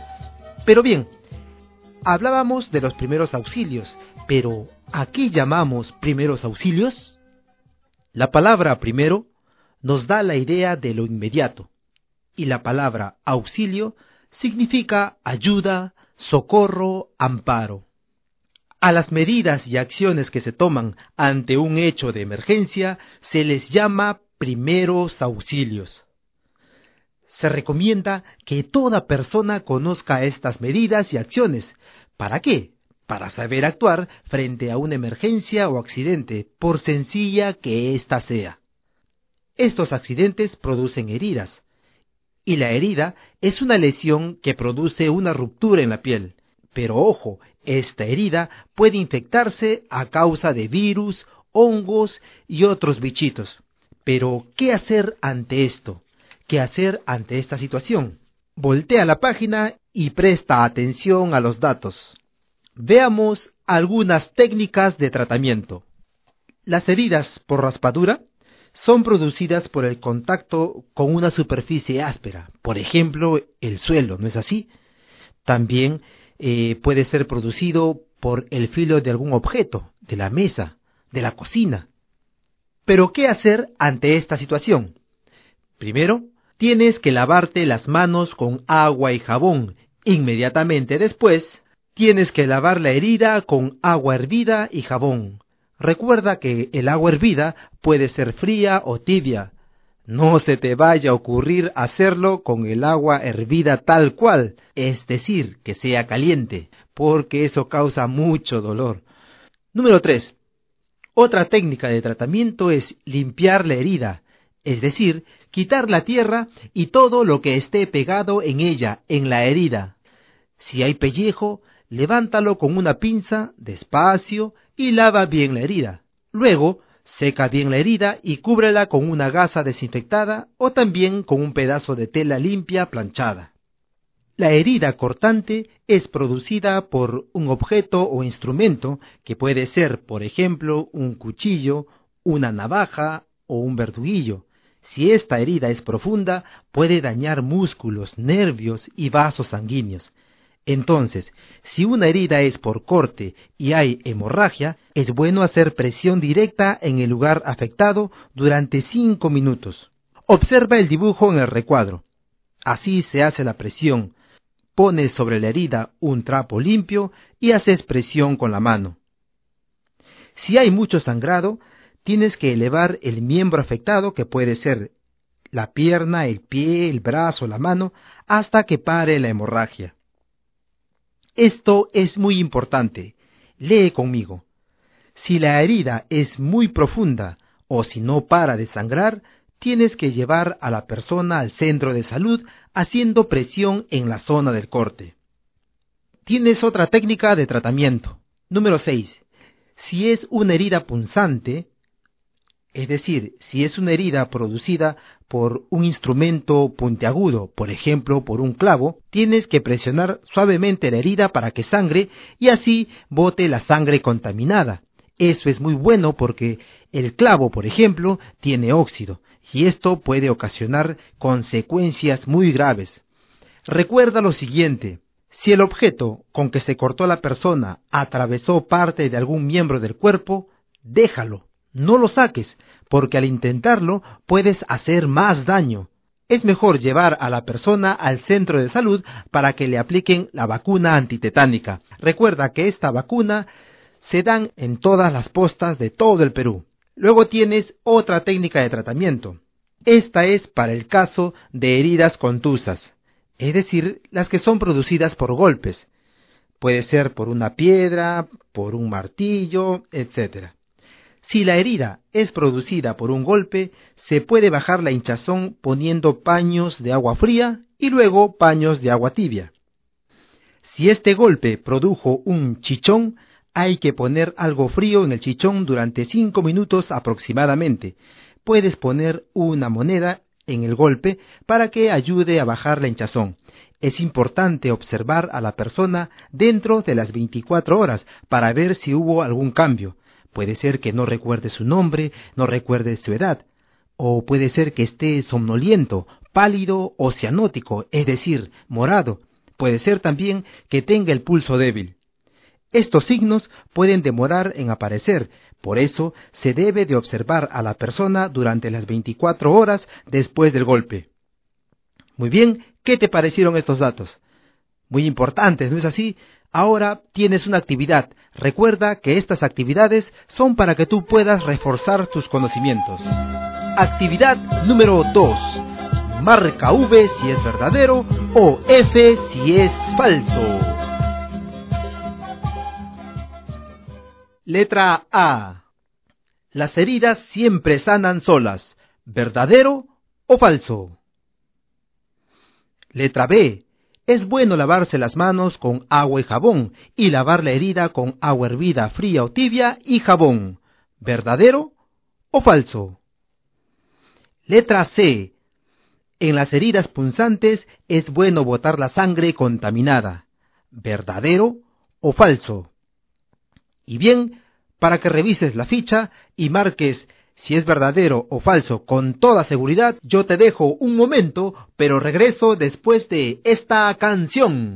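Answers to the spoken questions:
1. Falso
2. Verdadero
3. Verdadero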